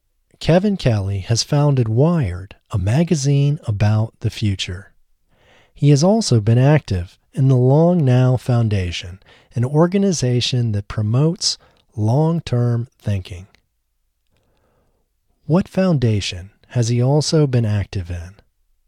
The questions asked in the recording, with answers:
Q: What foundation has he also been active in?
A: He has also been active in the Long Now Foundation.